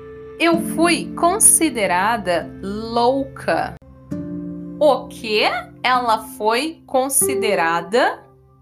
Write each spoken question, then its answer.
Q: O que ela foi considerada?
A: Louca. Ela foi considerada louca.